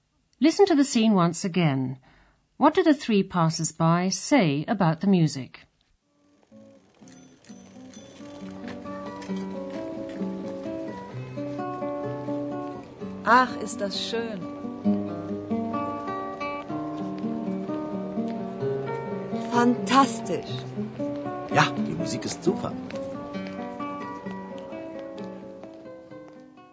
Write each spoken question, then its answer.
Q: what do the three passers-by say about the music?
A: All three think the music is very good